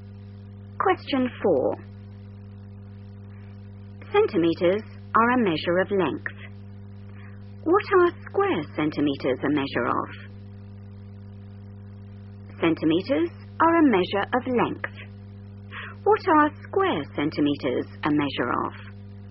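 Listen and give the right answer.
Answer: area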